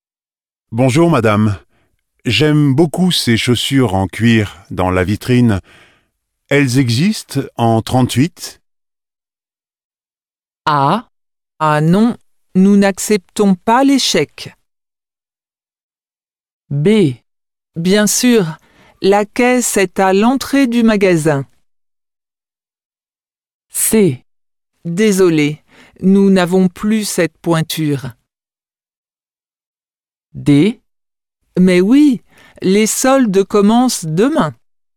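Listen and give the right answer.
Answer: C: Désolé, nous n'avons plus cette pointure.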